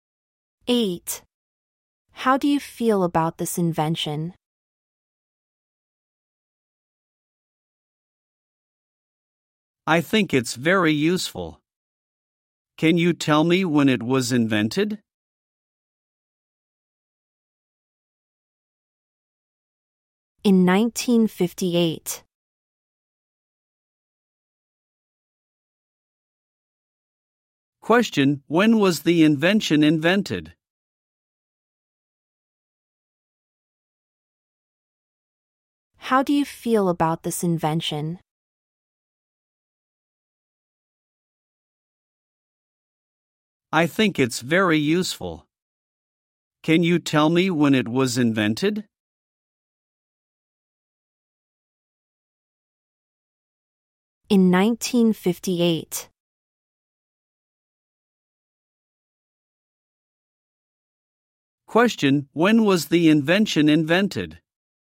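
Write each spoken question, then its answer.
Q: when was the invention invented?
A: In 1958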